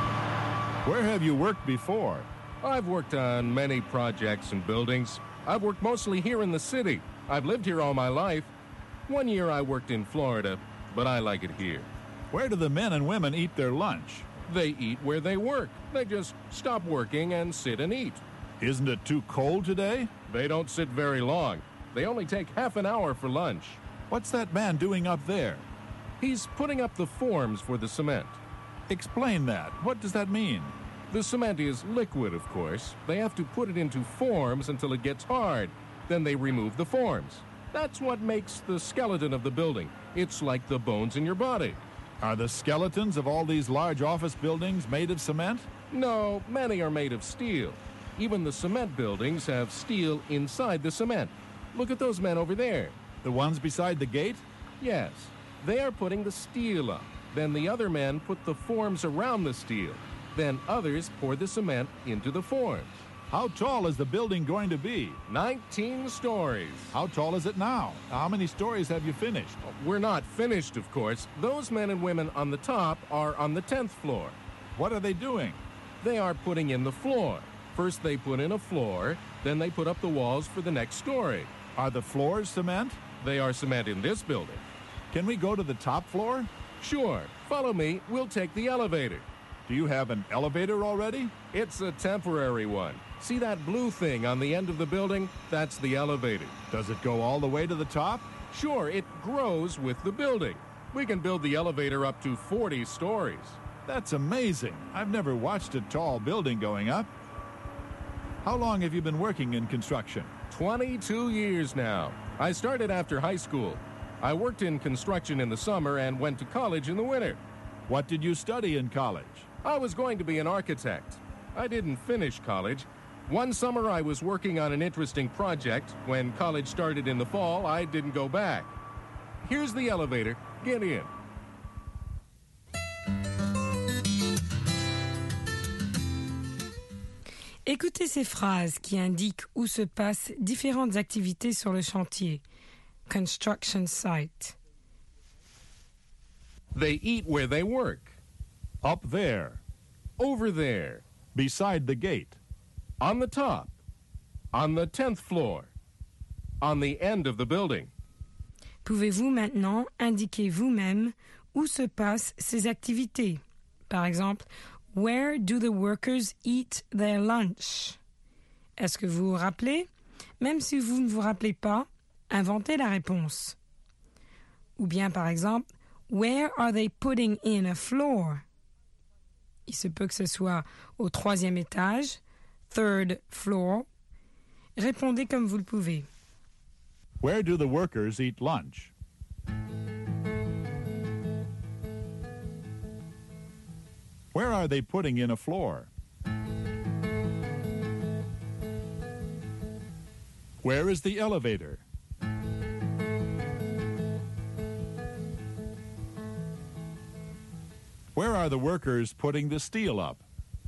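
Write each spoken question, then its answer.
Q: Where do the workers eat lunch?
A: Where they work

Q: Where are they putting in a floor?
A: On the top, on the 10th floor

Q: Where is the elevator?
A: On the end of the building

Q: Where are the workers putting the steel up?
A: Beside the gate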